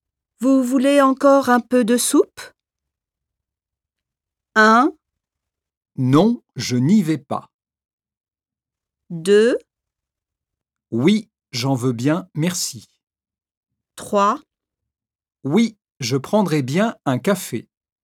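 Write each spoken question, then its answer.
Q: Vous voulez encore un peu de soupe?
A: 2: Oui, j'en veux bien, merci.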